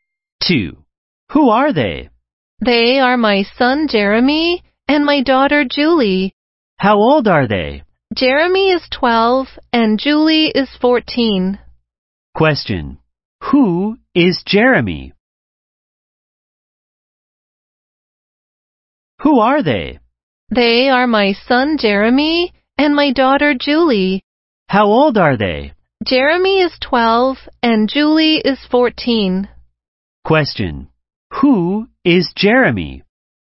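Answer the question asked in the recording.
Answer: The speaker's son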